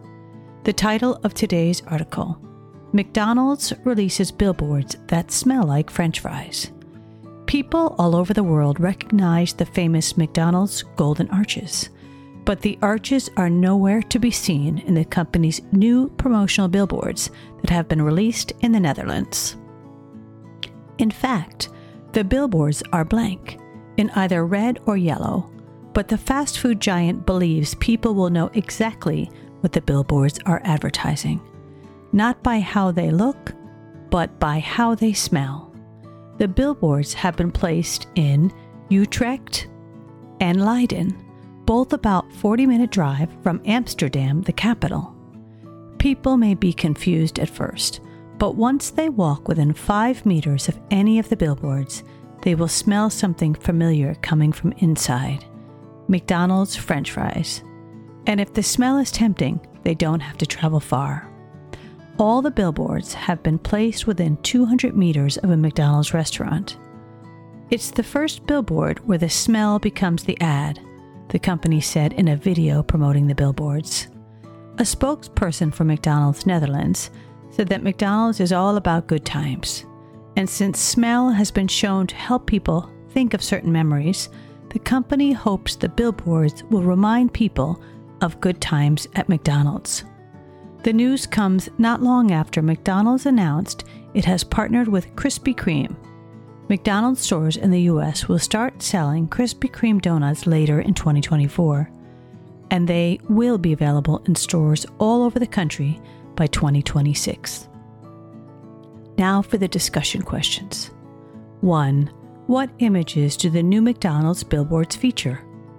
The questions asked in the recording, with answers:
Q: What images do the new McDonald's billboards feature?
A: none. They are blank in either red or yellow.